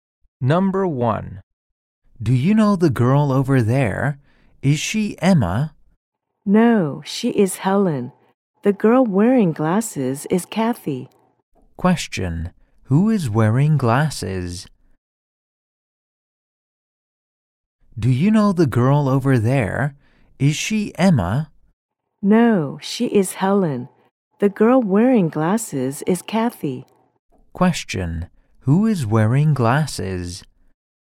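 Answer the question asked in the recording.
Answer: Kathy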